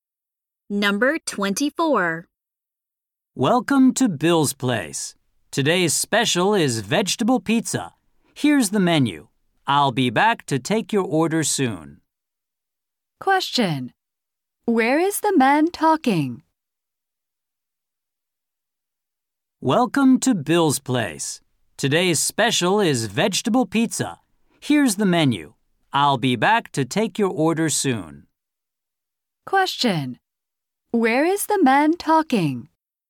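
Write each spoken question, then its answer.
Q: Where is the man talking?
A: At a restaurant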